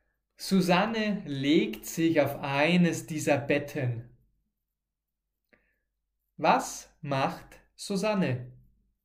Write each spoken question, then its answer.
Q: Was macht Susanne?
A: Sie legt sich auf eines dieser Betten.